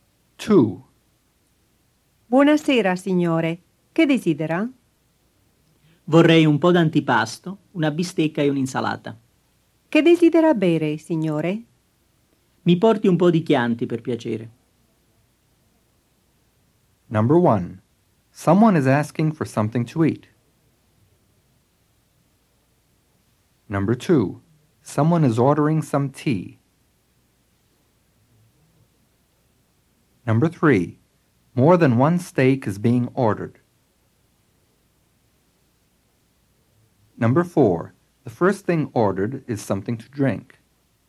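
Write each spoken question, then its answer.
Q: Someone is asking for something to eat.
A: True

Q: Someone is ordering some tea.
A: False

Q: More than one steak is being ordered.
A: False

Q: The first thing ordered is something to drink.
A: False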